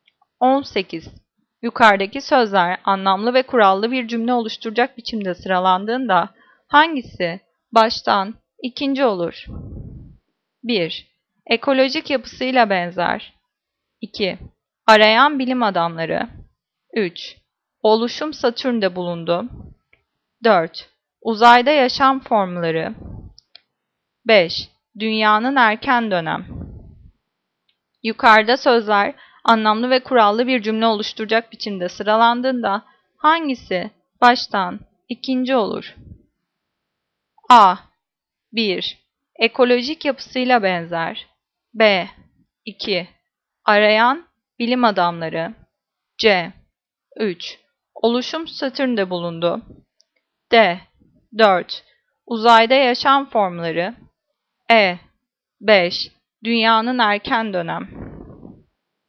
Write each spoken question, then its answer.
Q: Yukarıdaki sözler anlamlı ve kurallı bir cümle oluşturacak biçimde sıralandığında hangisi baştan ikinci olur?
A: Cevap B. 2. Arayan bilim adamları.